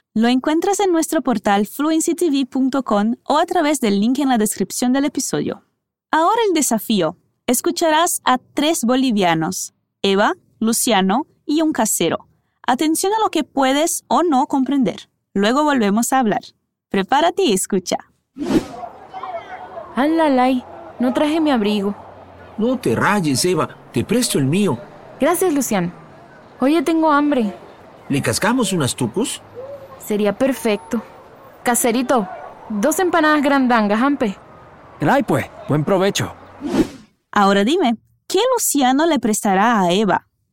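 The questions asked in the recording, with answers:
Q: ¿qué Luciano le prestará a Eva?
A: Su abrigo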